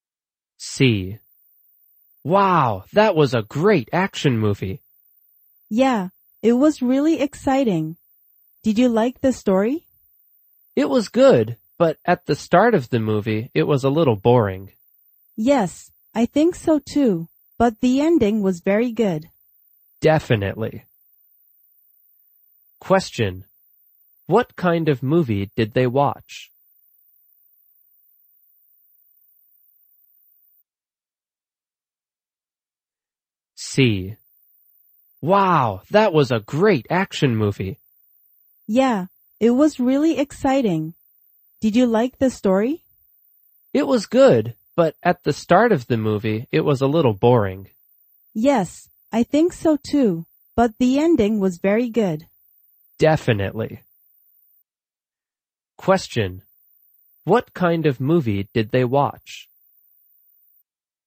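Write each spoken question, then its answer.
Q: What kind of movie did they watch?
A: An action movie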